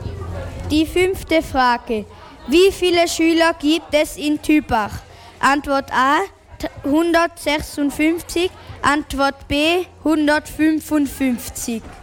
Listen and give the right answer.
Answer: Die richtige Antwort wäre 155.